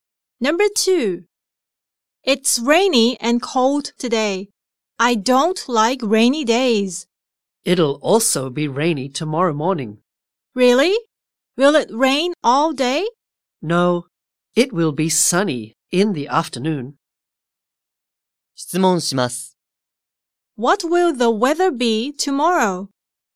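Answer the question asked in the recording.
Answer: Rainy in the morning, sunny in the afternoon.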